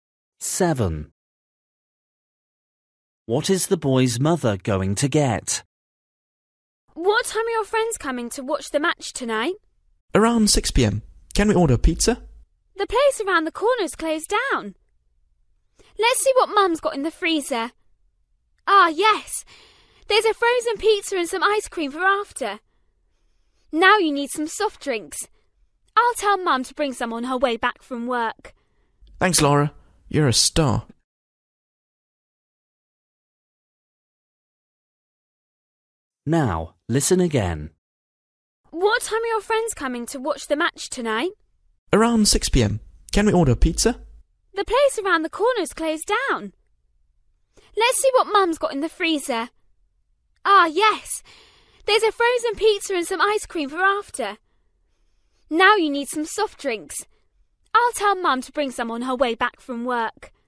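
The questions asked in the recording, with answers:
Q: What is the boy's mother going to get?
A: soft drinks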